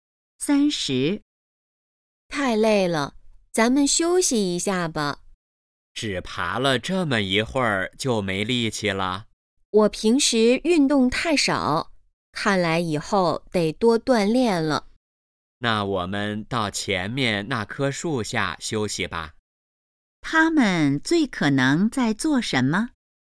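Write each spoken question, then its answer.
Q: 他们最可能在做什么?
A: 爬山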